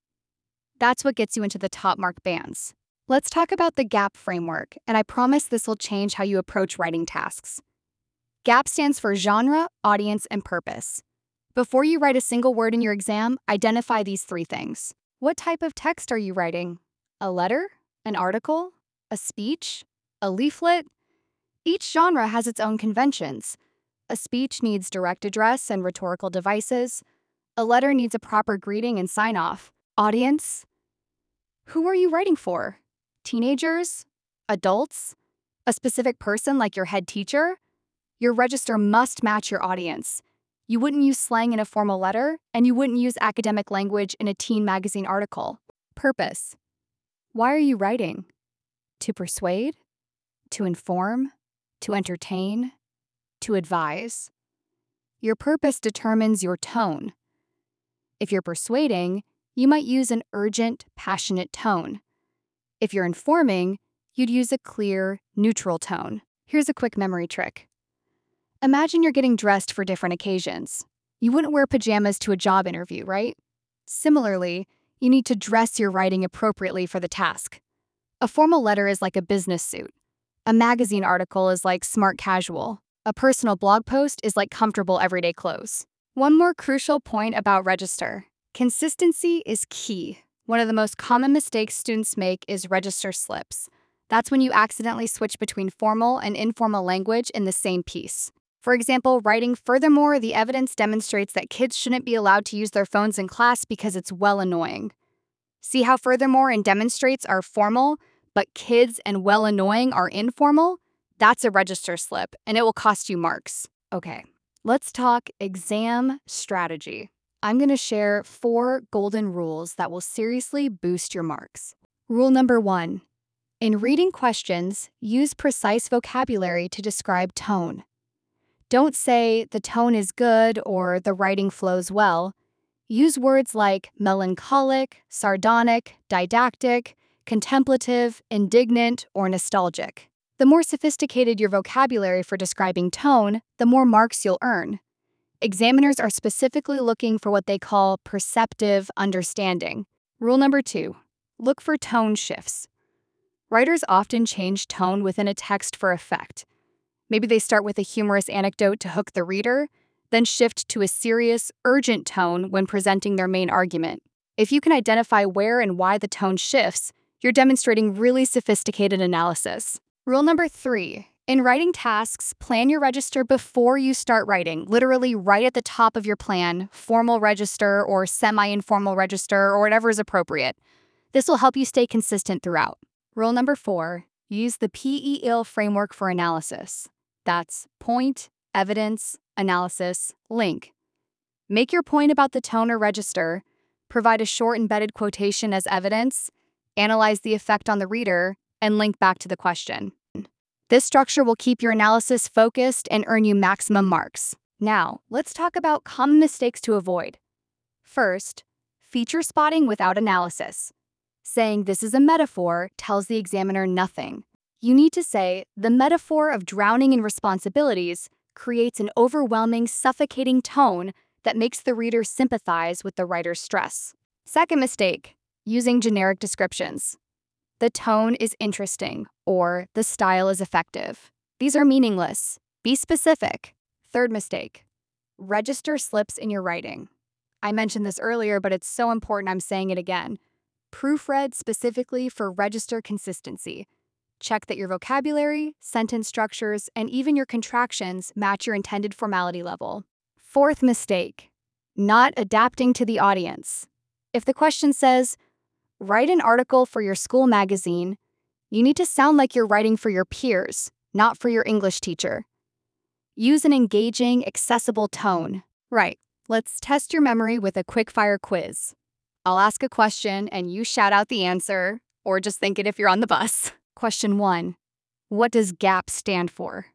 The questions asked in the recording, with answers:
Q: Question one, what does GAP stand for?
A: That's genre, audience, purpose.